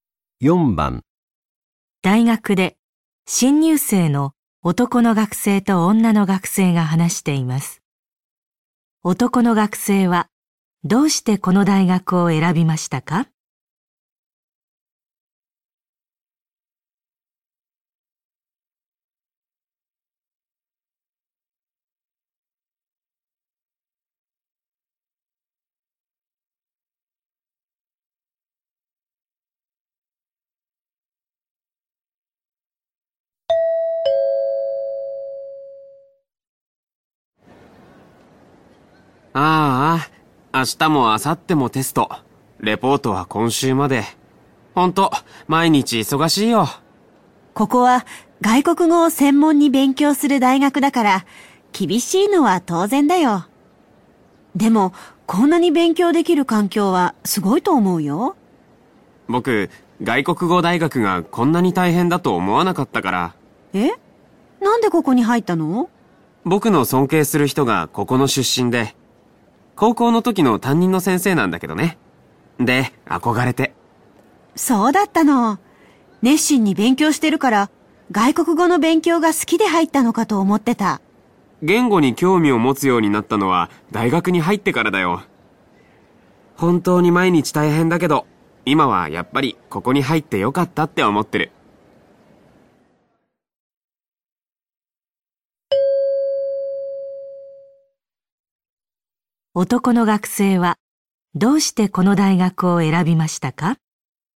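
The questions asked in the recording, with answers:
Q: 男の学生はどうしてこの大学を選びましたか?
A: 尊敬する高校の担任の先生がこの大学の出身で憧れたから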